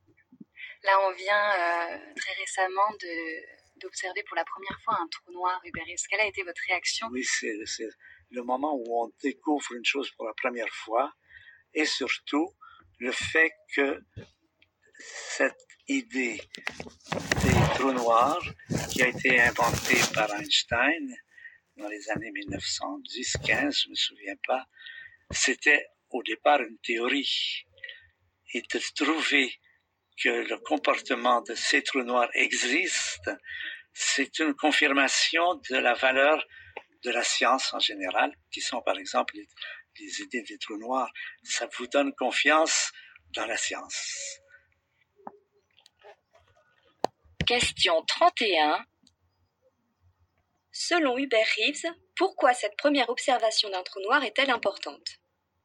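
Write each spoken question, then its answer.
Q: Selon Hubert Reeves, pourquoi cette première observation d'un trou noir est-elle importante?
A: Elle confirme une théorie d'Einstein et montre la valeur de la science, ce qui donne confiance en elle.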